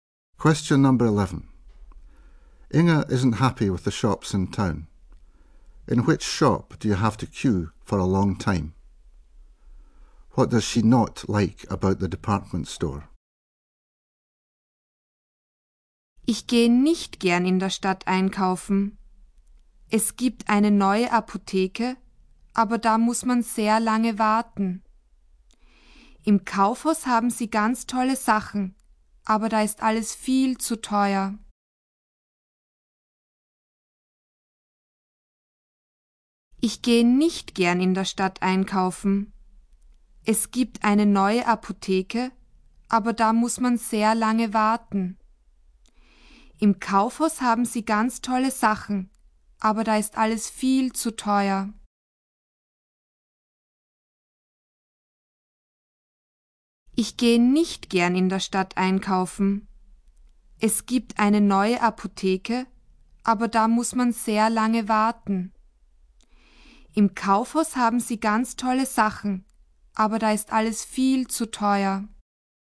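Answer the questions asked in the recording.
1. The new chemist's
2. Everything is far too expensive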